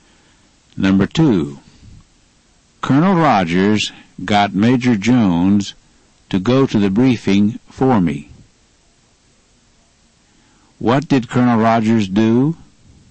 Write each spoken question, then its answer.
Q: What did Colonel Rogers do?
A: He got Major Jones to go to the briefing for me.